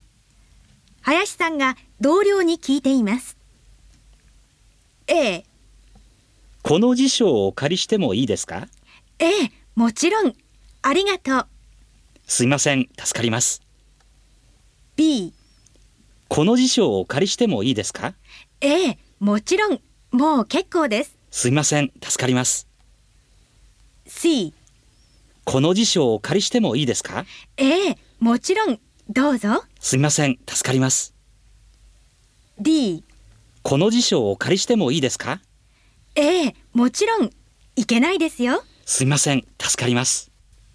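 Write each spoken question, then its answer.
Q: 林さんが同僚に聞いています。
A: C: この辞書をお借りしてもいいですか? もちろん、どうぞ。すみません、助かります。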